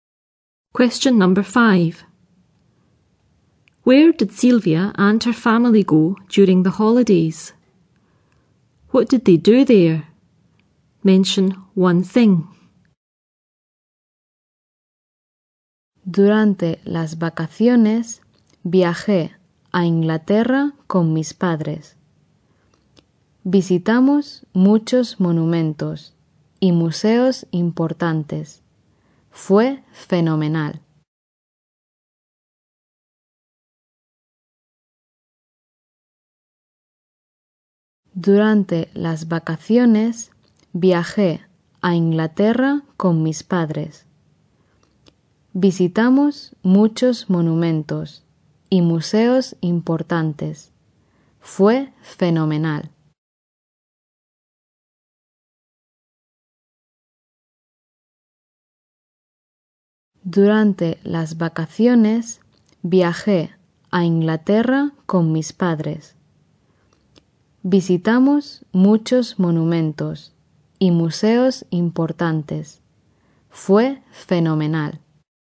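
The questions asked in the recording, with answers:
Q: Where did Silvia and her family go during the holidays?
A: England

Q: What did they do there?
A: Visited many important monuments and museums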